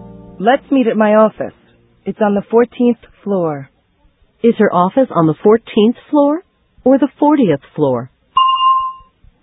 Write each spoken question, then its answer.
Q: Is her office on the 14th floor or the 40th floor?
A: It's on the 14th floor. 14.